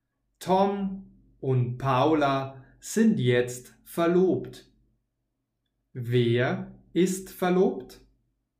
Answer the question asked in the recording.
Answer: Tom und Paula.